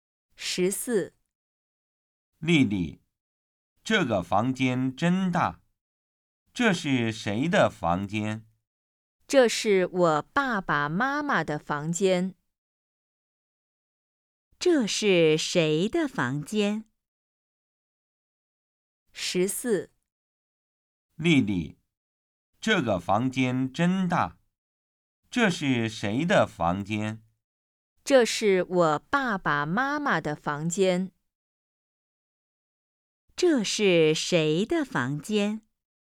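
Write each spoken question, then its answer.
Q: 这是谁的房间?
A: 丽丽爸爸妈妈的房间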